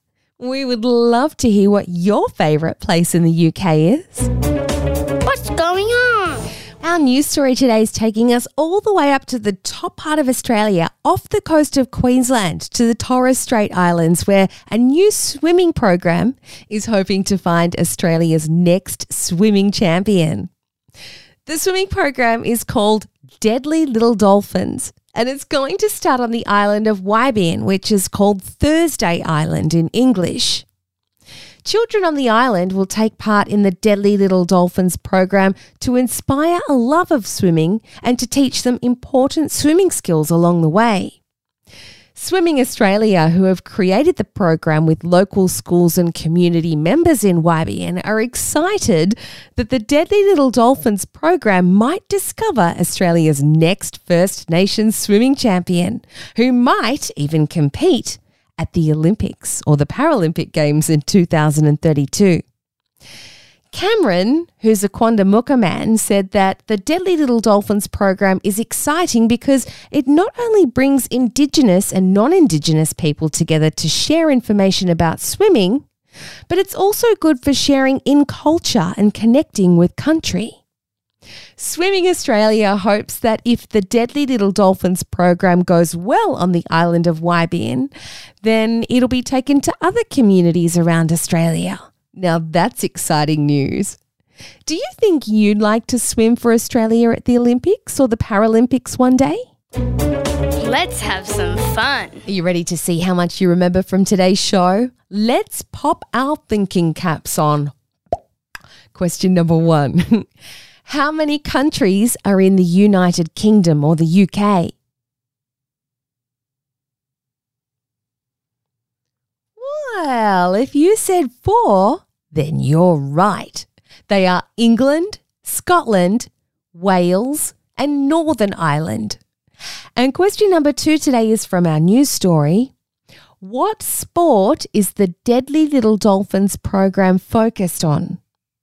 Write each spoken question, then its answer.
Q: What sport is the Deadly Little Dolphins program focused on?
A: Yes, hooray, it's swimming